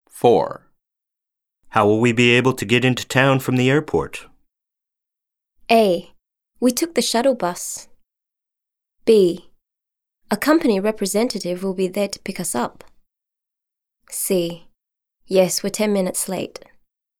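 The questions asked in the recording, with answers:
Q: How will we be able to get into town from the airport?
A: B: A company representative will be there to pick us up.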